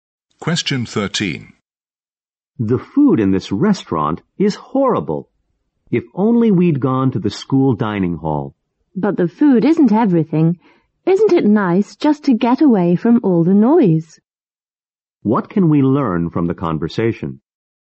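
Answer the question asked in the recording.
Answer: The food is bad, but the restaurant is nice and quiet.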